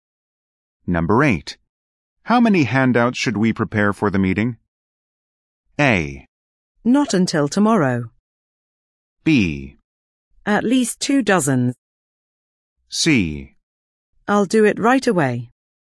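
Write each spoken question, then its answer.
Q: How many handouts should we prepare for the meeting?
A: B: At least 2 dozen.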